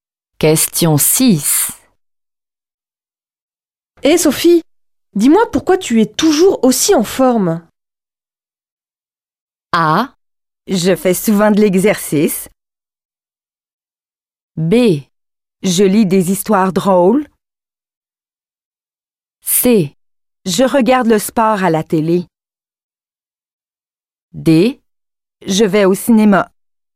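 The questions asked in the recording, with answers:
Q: Hey Sophie, dis-moi pourquoi tu es toujours aussi en forme?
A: A: Je fais souvent de l'exercice.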